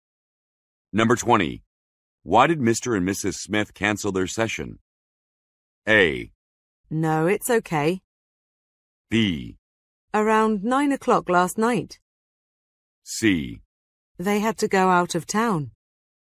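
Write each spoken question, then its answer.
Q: Why did Mr. and Mrs. Smith cancel their session?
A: C: They had to go out of town.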